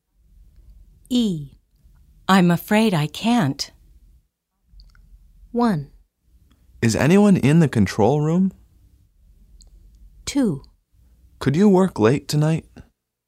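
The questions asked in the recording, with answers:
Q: I'm afraid I can't.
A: 2: Could you work late tonight?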